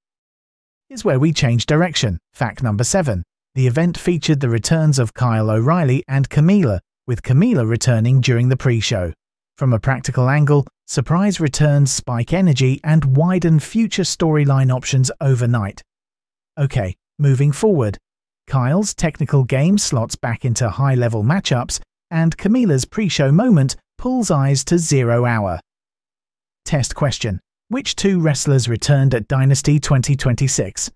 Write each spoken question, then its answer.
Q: Which two wrestlers returned at Dynasty 2026?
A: Kyle O'Reilly and Camila.